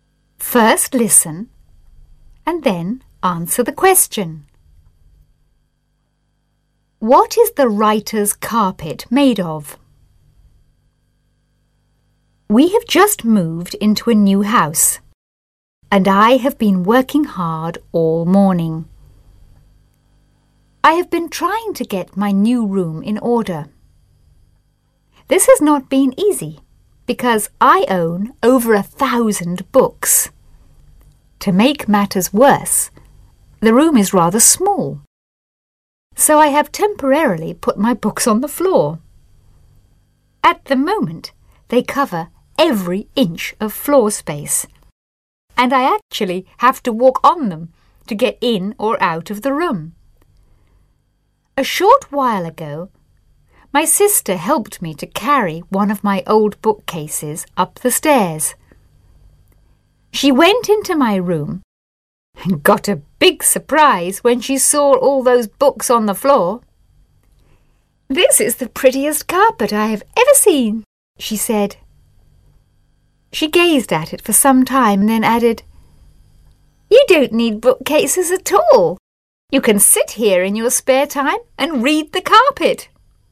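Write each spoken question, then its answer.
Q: What is the writer's carpet made of?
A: Books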